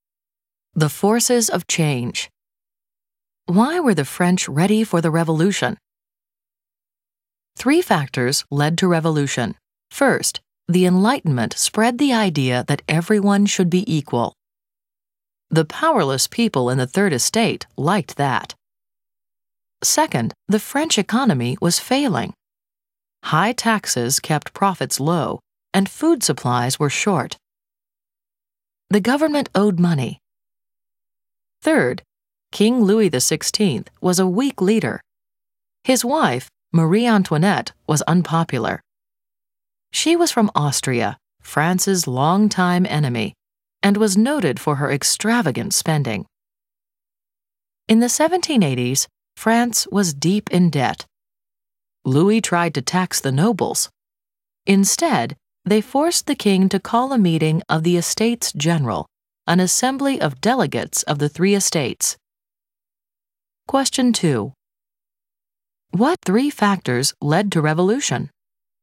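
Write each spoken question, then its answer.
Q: What three factors led to revolution?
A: Enlightenment ideas of equality, a failing economy, and a weak king (Louis XVI)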